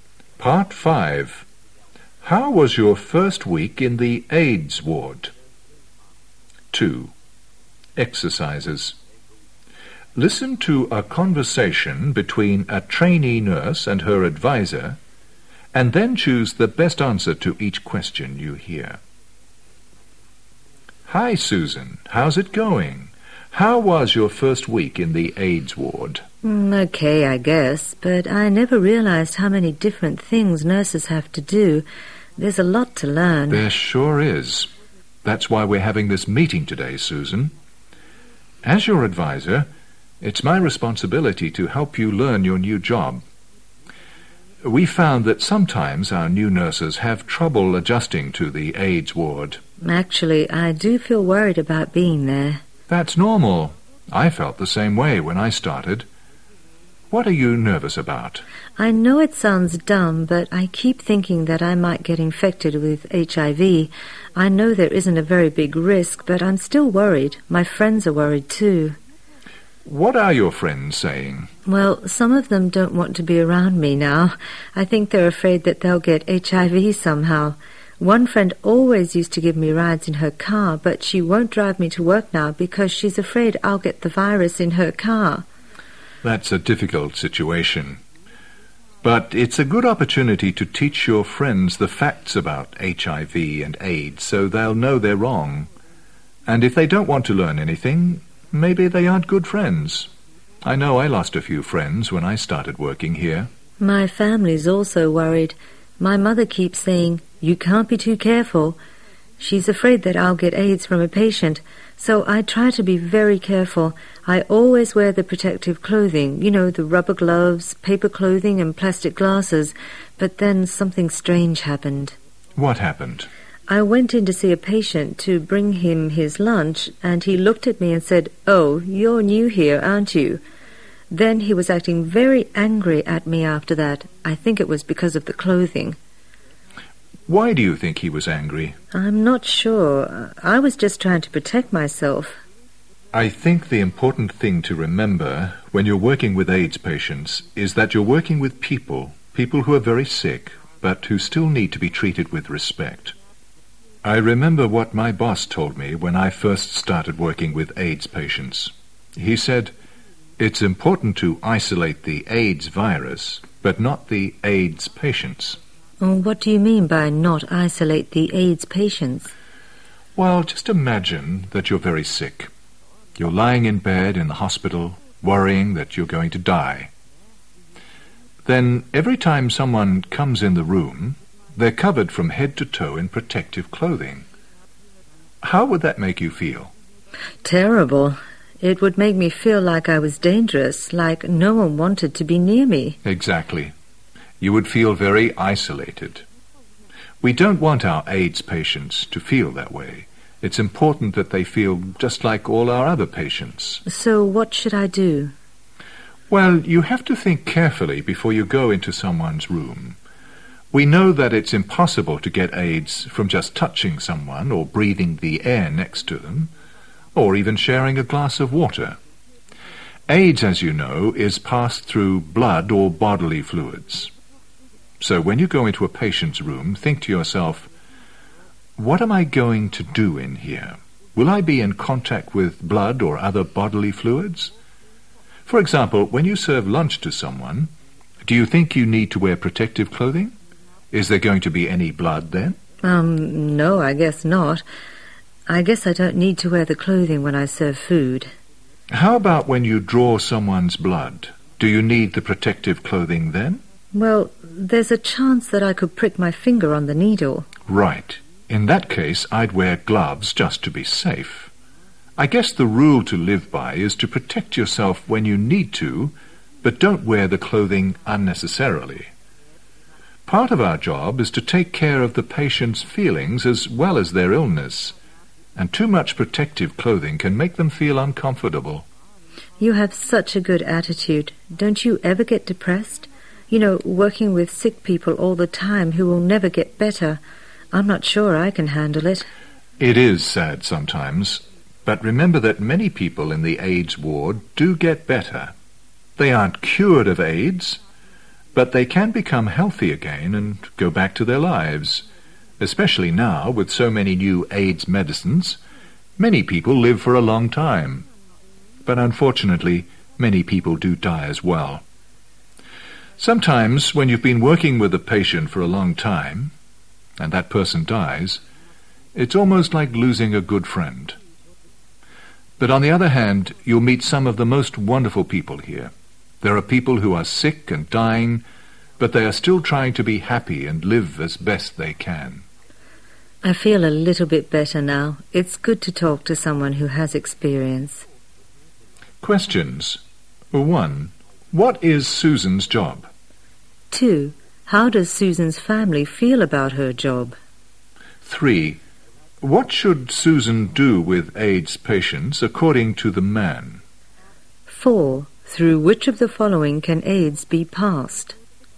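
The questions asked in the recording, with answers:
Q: What is Susan's job?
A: A trainee nurse in the AIDS ward

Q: How does Susan's family feel about her job?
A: They are worried

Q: What should Susan do with AIDS patients according to the man?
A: Treat them with respect and not isolate them

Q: Through which of the following can AIDS be passed?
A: Blood or bodily fluids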